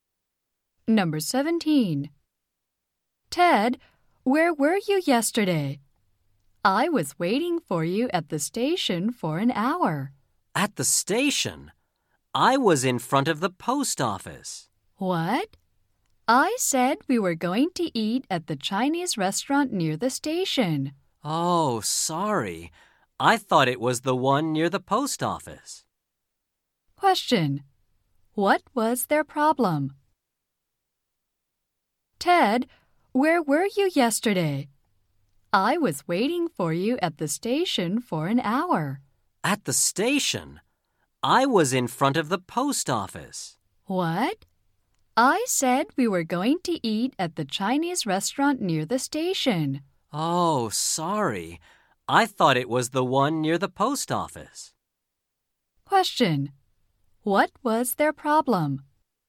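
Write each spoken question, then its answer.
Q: What was their problem?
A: They waited in different places.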